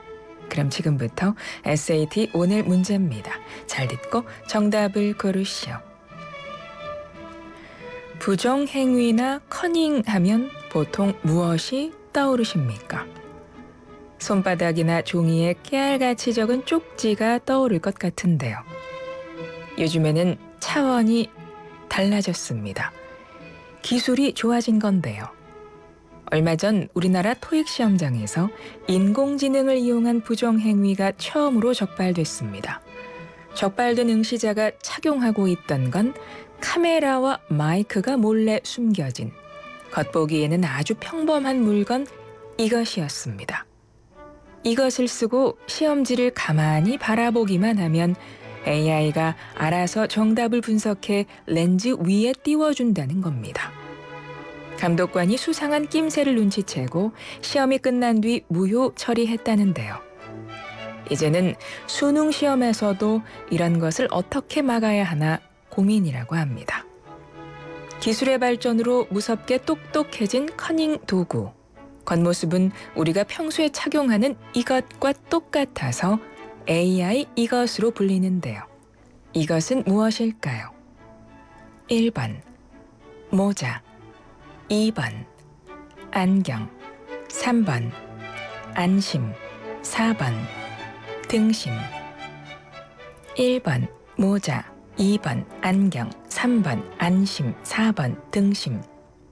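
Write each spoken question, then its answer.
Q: 이것은 무엇일까요? 1번 모자, 2번 안경, 3번 안심, 4번 등심.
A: 2: 안경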